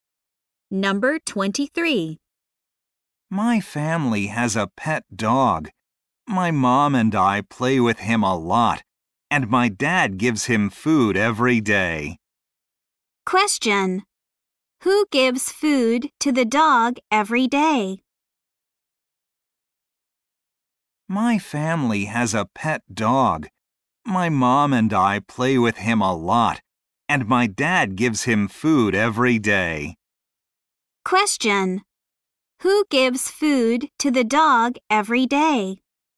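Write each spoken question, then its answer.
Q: Who gives food to the dog every day?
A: Her dad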